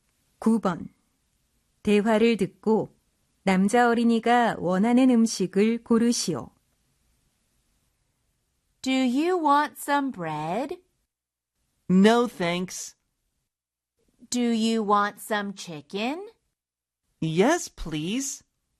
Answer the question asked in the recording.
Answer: 2번 chicken이 정답이 되겠죠?